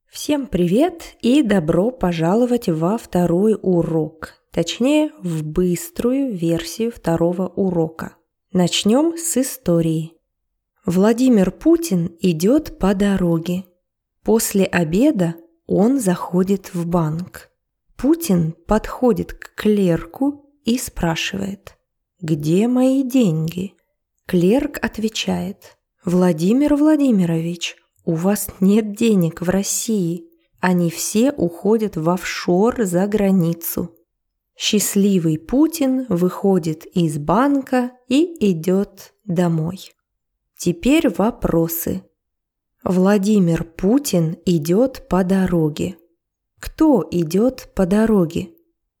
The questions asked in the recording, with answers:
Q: Кто идет по дороге?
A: Владимир Путин – президент России.